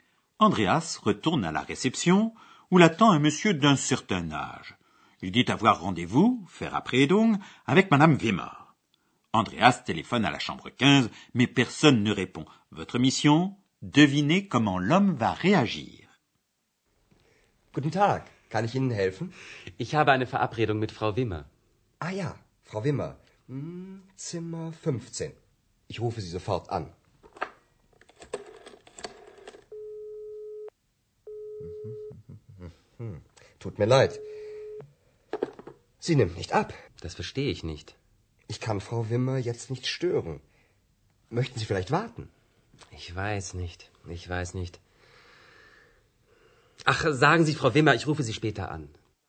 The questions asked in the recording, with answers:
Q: Devinez comment l'homme va réagir.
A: Le monsieur fait savoir Madame Wimmer qu'il l'appellera plus tard.